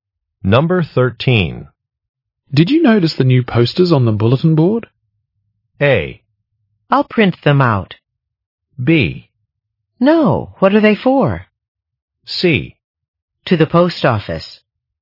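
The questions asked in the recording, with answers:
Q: Did you notice the new posters on the bulletin board?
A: B: No, what are they for?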